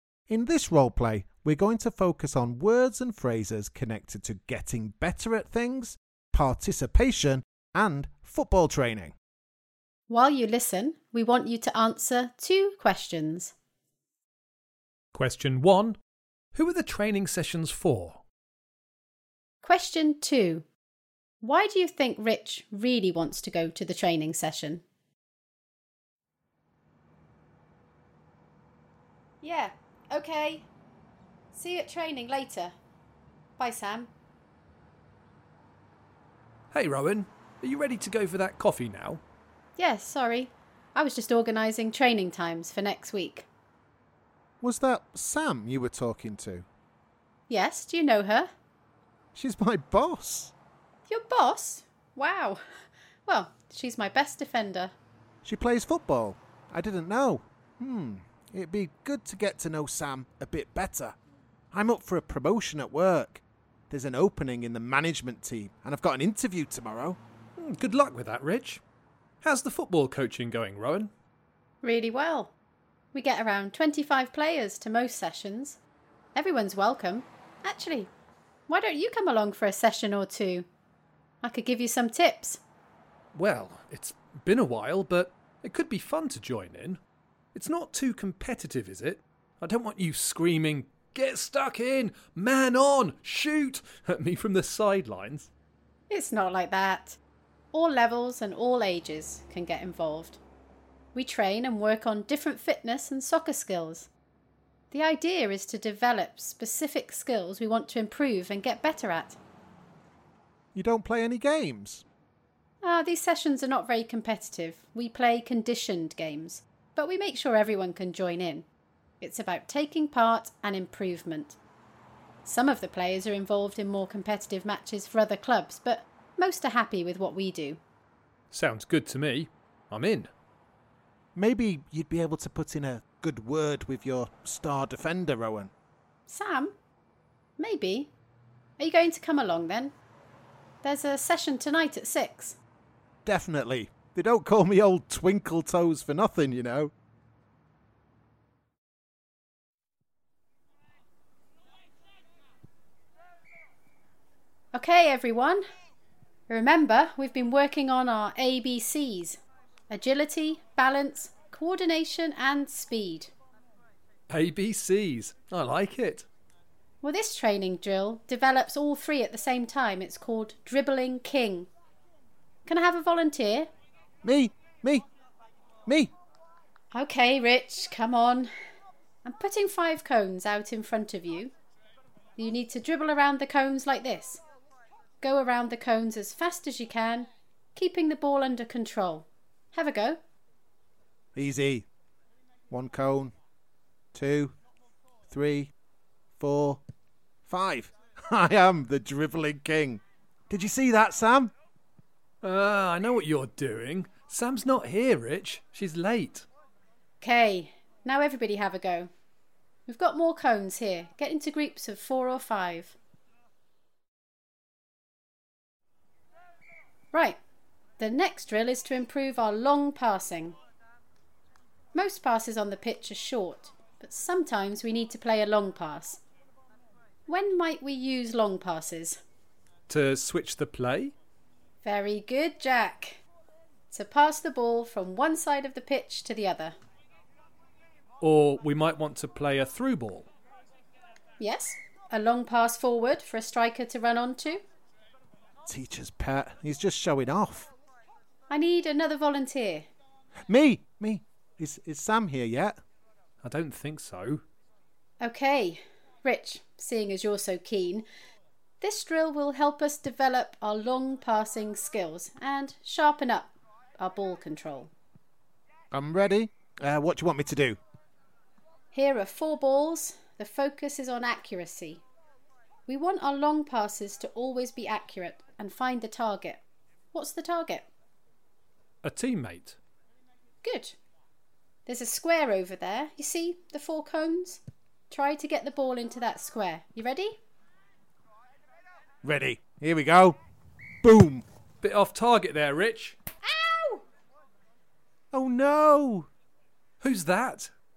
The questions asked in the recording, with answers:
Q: who are the training sessions for?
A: The answer is everyone.

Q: why do you think Rich really wants to go to the training session?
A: he definitely became more interested when he found out that his boss would be there.